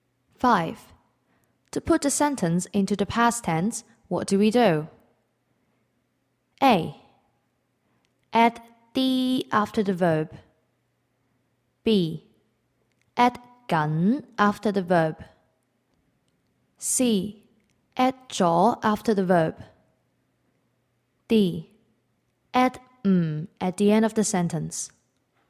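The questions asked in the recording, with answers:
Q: To put the sentence into the past tense, what do we do?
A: C: Add 咗 after the verb.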